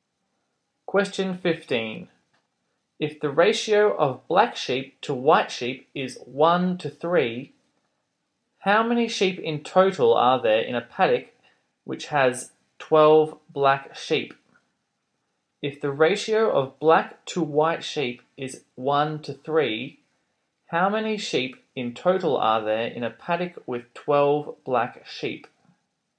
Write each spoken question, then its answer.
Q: If the ratio of black to white sheep is 1 to 3, how many sheep in total are there in a paddock with 12 black sheep?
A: 48.